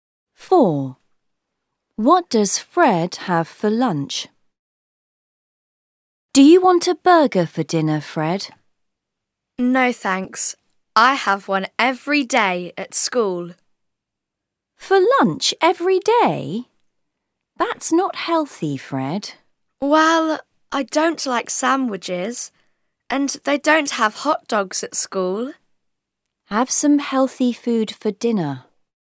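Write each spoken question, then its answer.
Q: What does Fred have for lunch?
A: A burger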